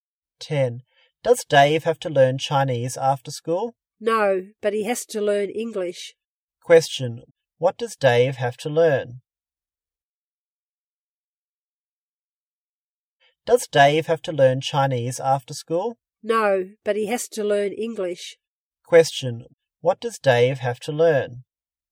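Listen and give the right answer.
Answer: English.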